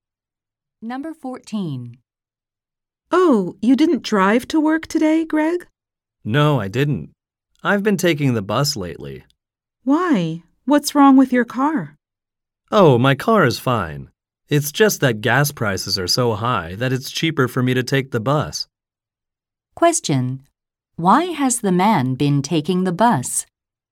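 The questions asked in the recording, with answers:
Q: Why has the man been taking the bus?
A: Gas prices are high.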